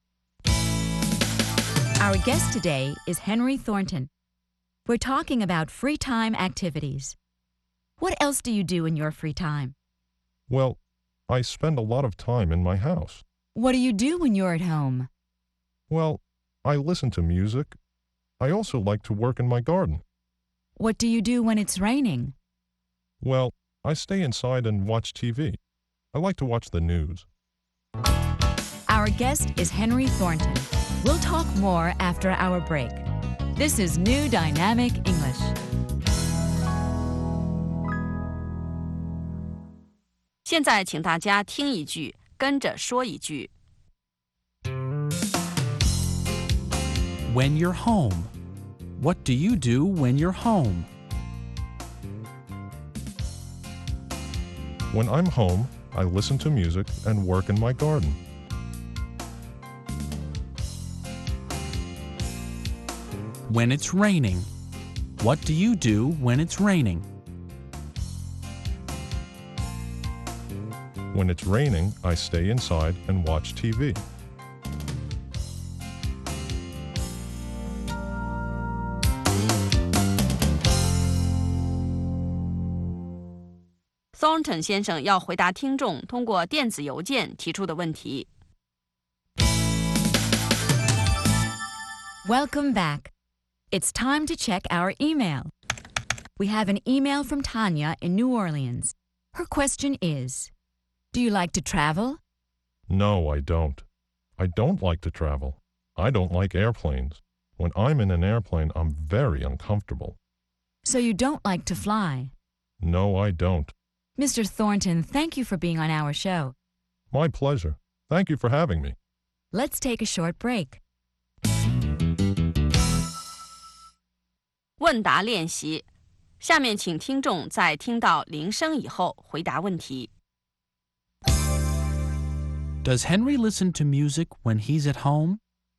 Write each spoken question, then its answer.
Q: Does Henry listen to music when he's at home?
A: Yes, he does. He listens to music.